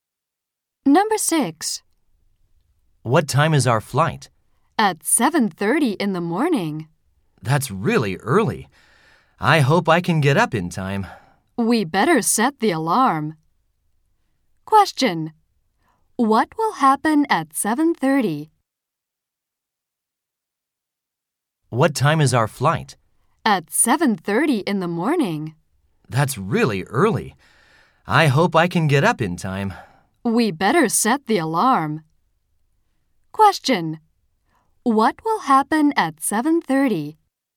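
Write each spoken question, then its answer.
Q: What will happen at 7:30?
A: Their flight will leave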